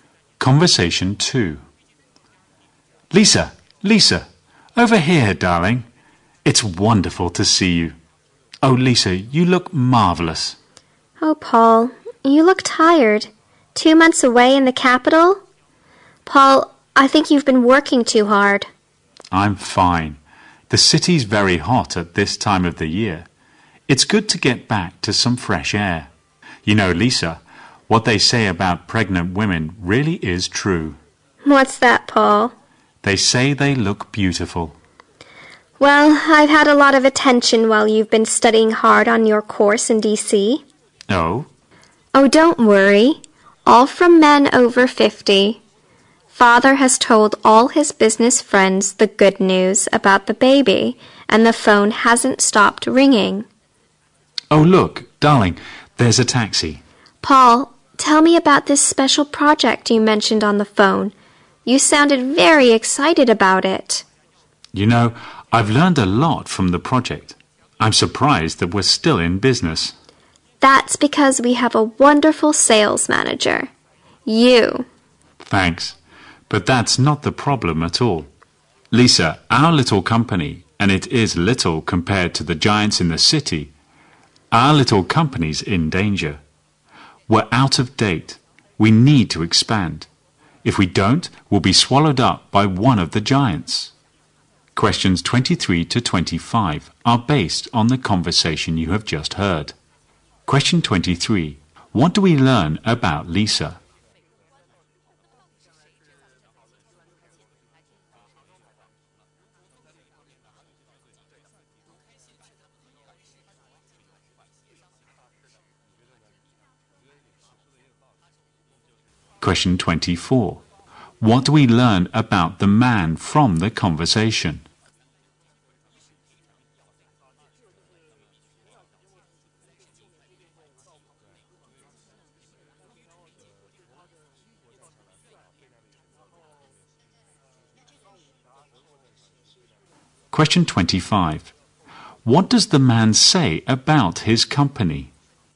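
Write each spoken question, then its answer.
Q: What do we learn about Lisa?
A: She is pregnant.

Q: What do we learn about the man from the conversation?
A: He has just come back from two months studying on a course in D.C.

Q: What does the man say about his company?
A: It is small and in danger; it needs to expand.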